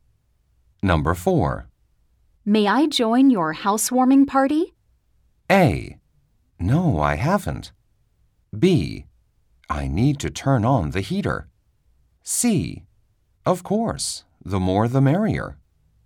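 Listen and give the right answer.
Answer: C: Of course, the more the merrier.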